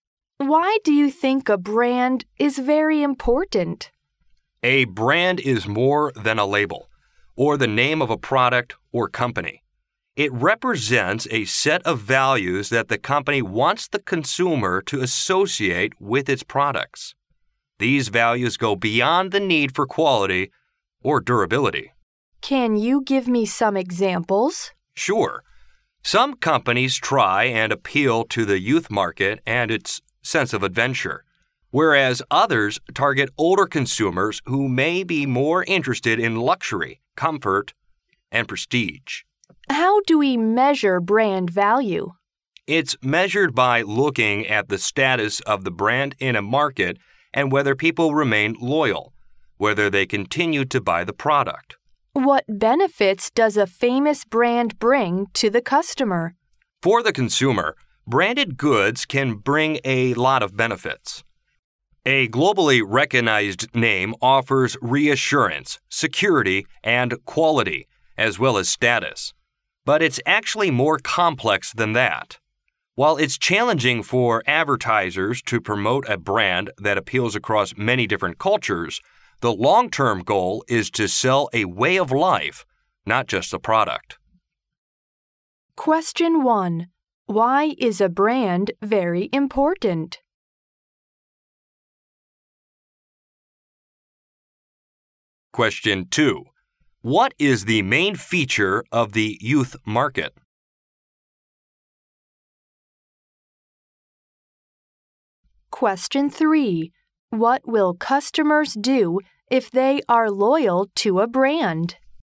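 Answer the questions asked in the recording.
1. It represents a set of values the company wants consumers to associate with its products
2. Its sense of adventure
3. Continue to buy the product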